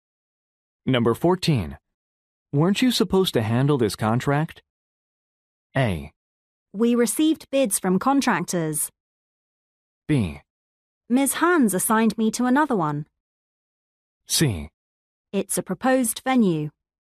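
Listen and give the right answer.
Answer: B: Ms. Hans assigned me to another one.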